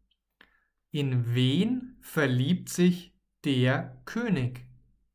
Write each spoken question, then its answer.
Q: In wen verliebt sich der König?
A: In Bettina. Er verliebt sich in Bettina.